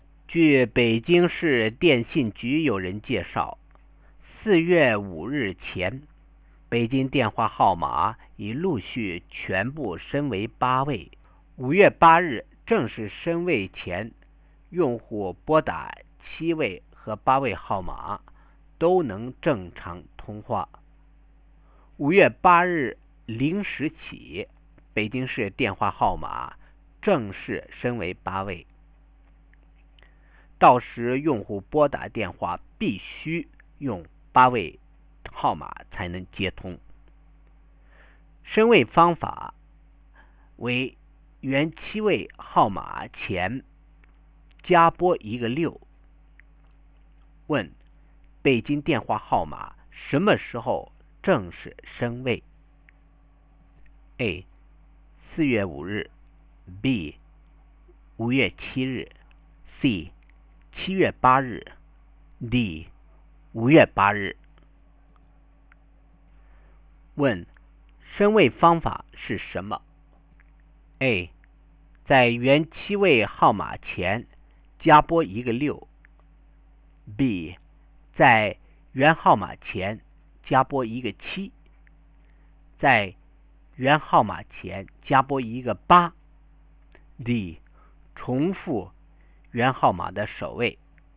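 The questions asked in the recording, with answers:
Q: 北京电话号码什么时候正式升位?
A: D: 5月8日

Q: 升位方法是什么?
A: A: 在原7位号码前加拨一个6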